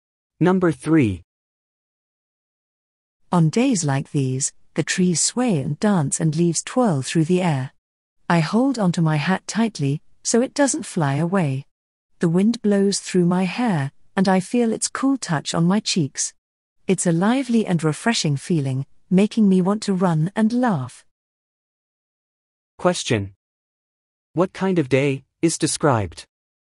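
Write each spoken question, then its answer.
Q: What kind of day is described?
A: A windy day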